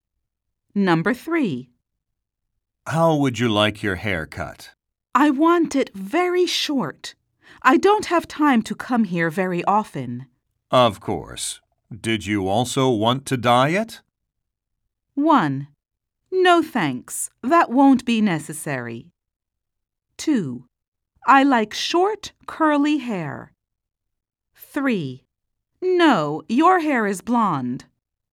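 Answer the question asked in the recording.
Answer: 1: No thanks. That won't be necessary.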